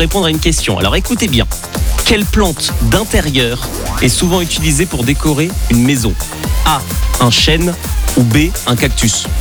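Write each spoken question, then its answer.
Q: quelle plante d'intérieur est souvent utilisée pour décorer une maison?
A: B: un cactus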